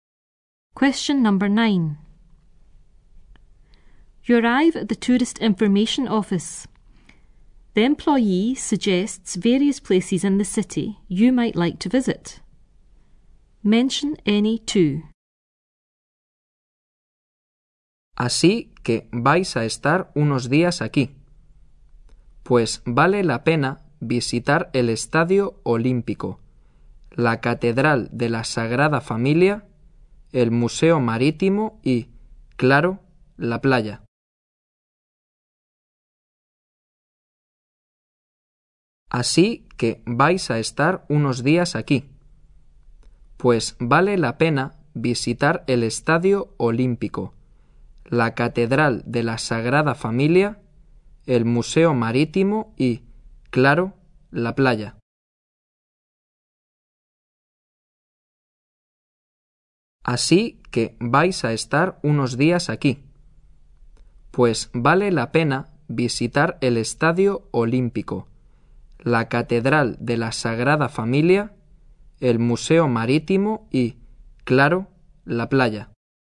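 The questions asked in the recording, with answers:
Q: Mention any two.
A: Two of: Olympic Stadium, Sagrada Familia cathedral, Maritime Museum, beach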